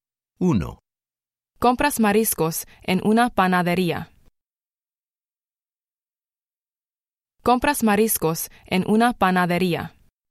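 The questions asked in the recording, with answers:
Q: Compras mariscos en una panadería.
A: no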